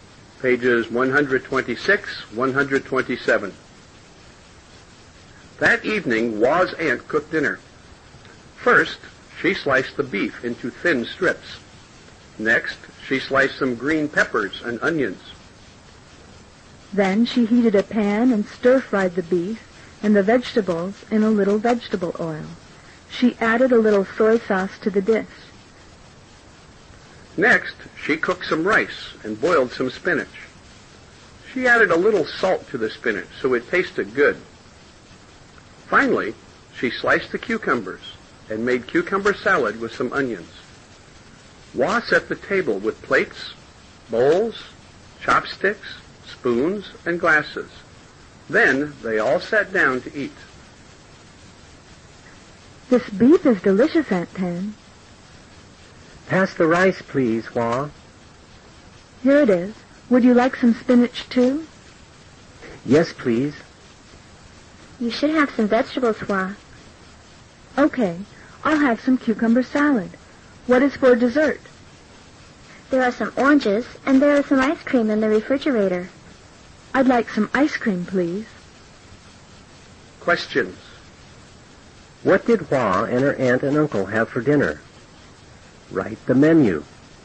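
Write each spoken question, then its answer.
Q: What did Hua and her aunt and uncle have for dinner? Write the menu.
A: Stir-fried beef with green peppers and onions, rice, boiled spinach, cucumber salad, and ice cream or oranges for dessert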